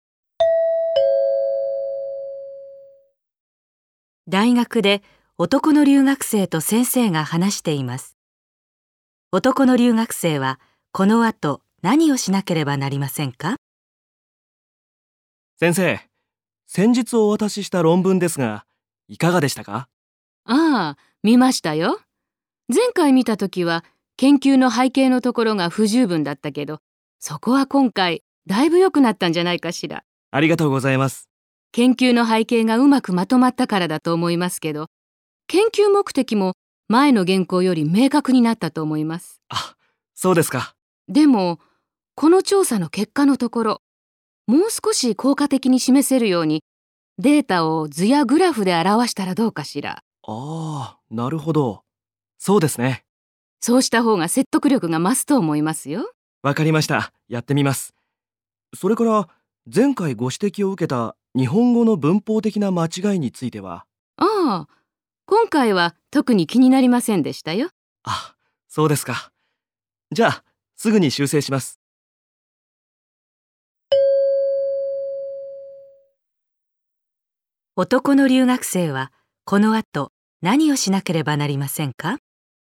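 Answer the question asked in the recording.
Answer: 調査結果のデータを図やグラフで表す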